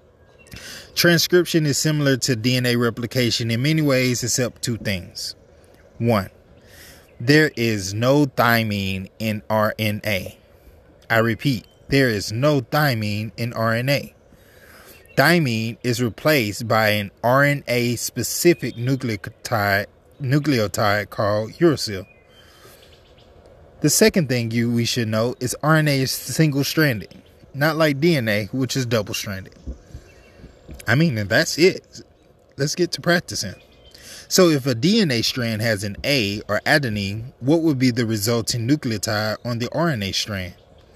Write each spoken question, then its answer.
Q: So if a DNA strand has an A or adenine, what would be the resulting nucleotide on the RNA strand?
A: So on the resulting RNA strand, the complementary base pair will be uracil, because U replaces T in RNA.